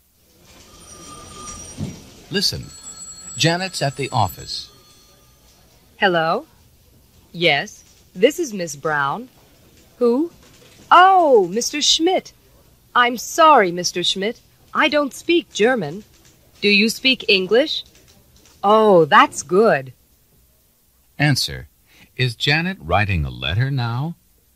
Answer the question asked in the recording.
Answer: No, she's not.